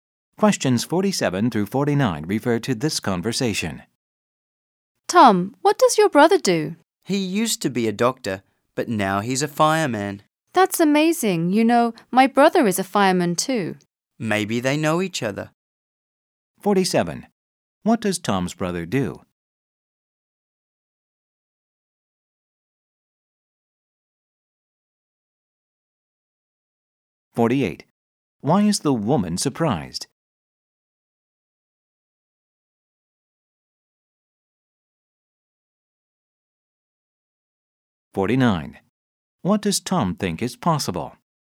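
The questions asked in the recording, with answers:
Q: What does Tom's brother do?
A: He is a fireman

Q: Why is the woman surprised?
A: Her brother is a fireman too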